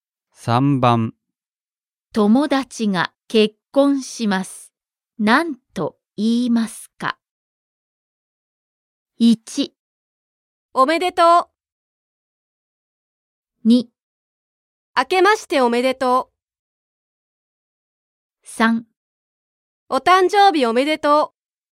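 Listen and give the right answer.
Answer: 1: おめでとう。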